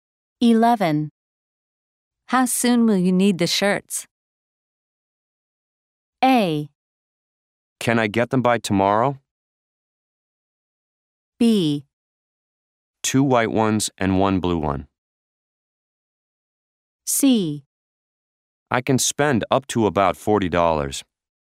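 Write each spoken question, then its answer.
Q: How soon will you need the shirts?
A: A: Can I get them by tomorrow?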